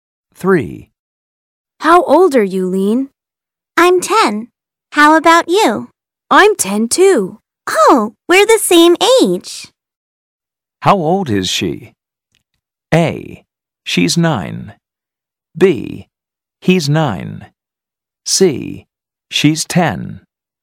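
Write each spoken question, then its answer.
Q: How old is she?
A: C: She's 10.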